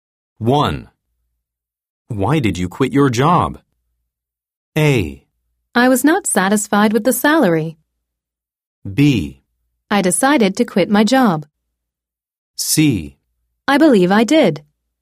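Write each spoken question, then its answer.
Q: Why did you quit your job?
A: A: I was not satisfied with the salary.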